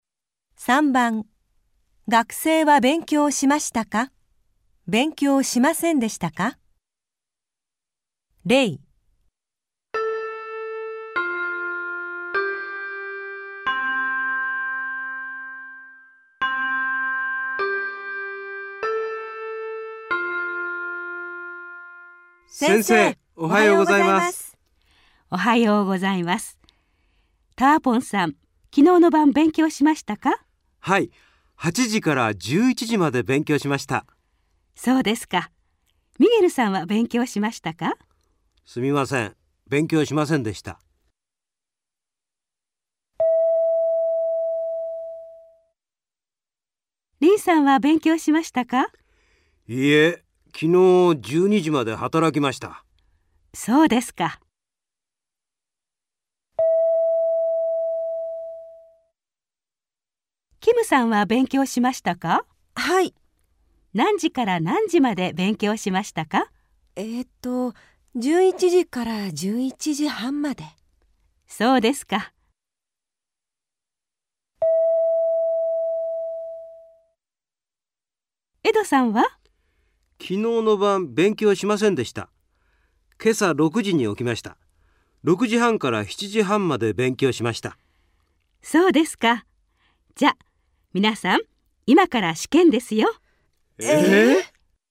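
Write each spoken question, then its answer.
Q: 学生は勉強しましたか?勉強しませんでしたか?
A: ミゲルさん:勉強しませんでした

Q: 学生は勉強しましたか?勉強しませんでしたか?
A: リンさん:勉強しませんでした

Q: 学生は勉強しましたか?勉強しませんでしたか?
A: キムさん:勉強しました(11時から11時半まで)

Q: 学生は勉強しましたか?勉強しませんでしたか?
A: エドさん:勉強しました(今朝6時半から7時半まで)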